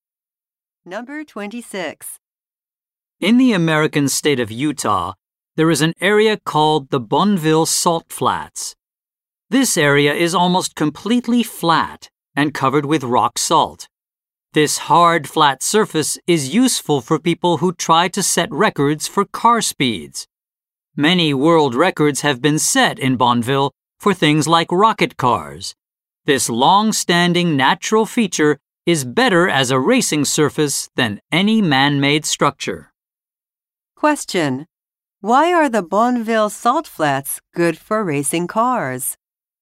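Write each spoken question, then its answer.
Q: Why are the Bonneville Salt Flats good for racing cars?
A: The surface is hard and flat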